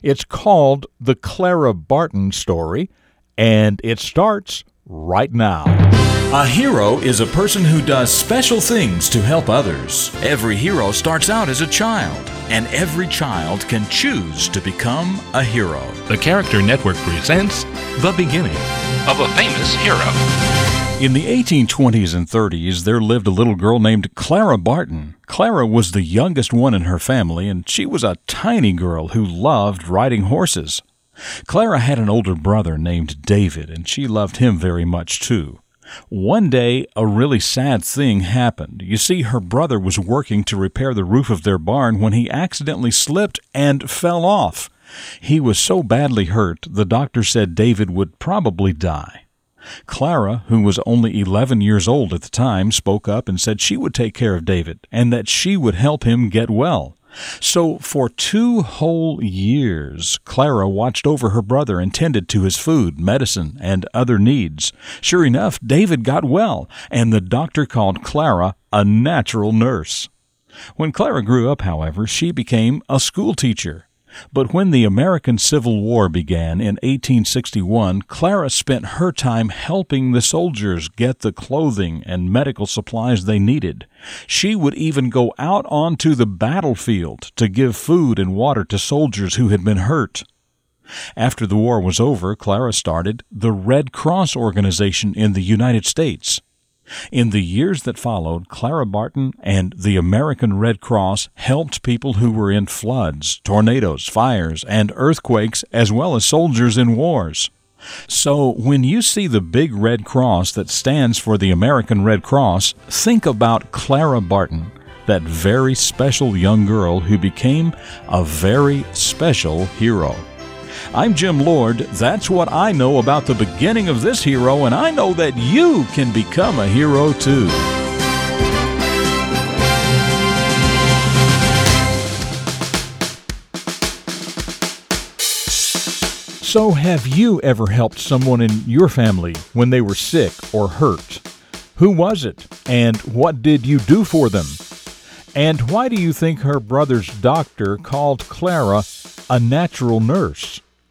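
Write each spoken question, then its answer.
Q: And why do you think her brother's doctor called Clara a natural nurse?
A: Because she took care of her badly hurt brother David for two years, and he got well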